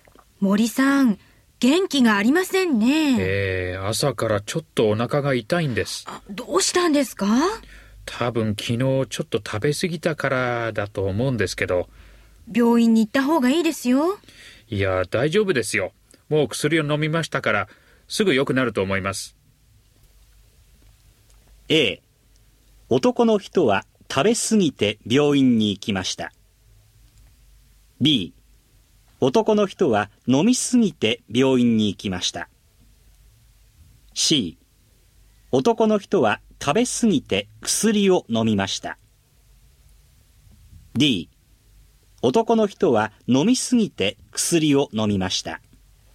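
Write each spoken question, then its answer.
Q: A、 男の人は食べ過ぎて病院に行きました。 B、男の人は飲みすぎて病院に行きました。 C、 男の人は食べすぎて薬を飲みました。 D、 男の人は飲みすぎて薬を飲みました。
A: C: 男の人は食べすぎて薬を飲みました。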